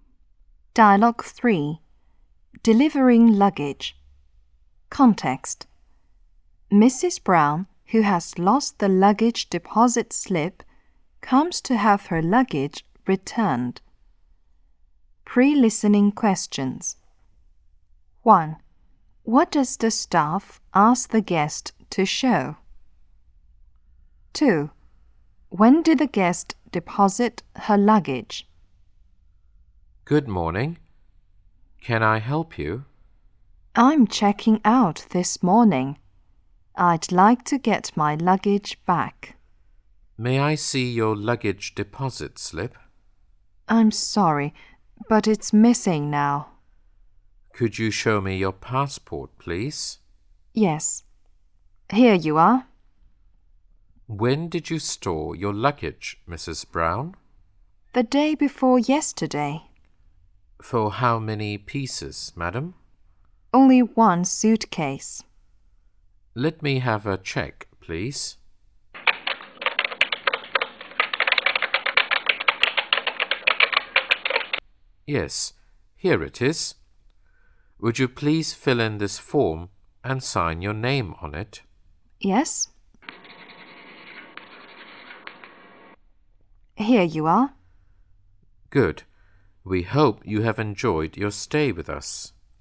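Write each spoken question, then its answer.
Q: What does the staff ask the guest to show?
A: Her passport

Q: When did the guest deposit her luggage?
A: The day before yesterday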